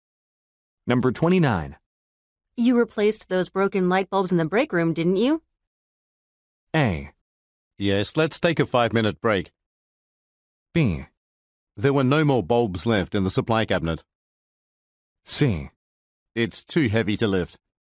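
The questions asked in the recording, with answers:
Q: You replaced those broken light bulbs in the break room, didn't you?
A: B: There were no more bulbs left in the supply cabinet.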